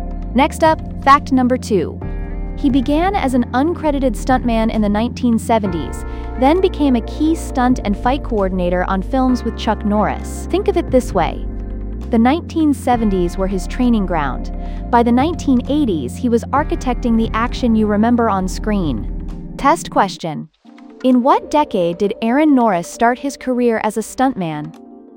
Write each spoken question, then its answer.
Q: in what decade did Aaron Norris start his career as a stuntman?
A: the 1970s.